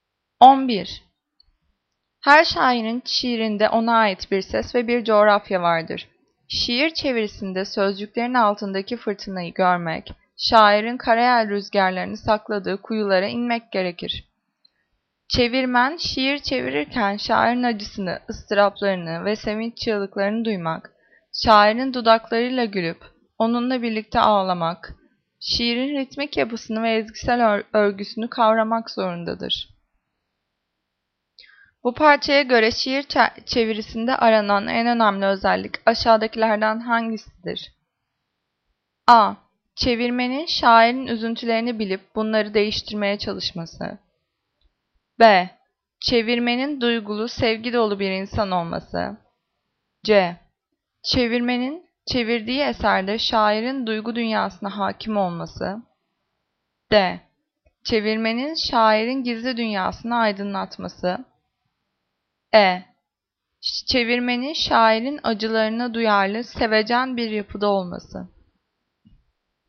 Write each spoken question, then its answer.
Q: Bu parçaya göre şiir çevirisinde aranan en önemli özellik aşağıdakilerden hangisidir?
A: Cevap C. Çevirmenin çevirdiği eserde şairin duygu dünyasına hakim olması.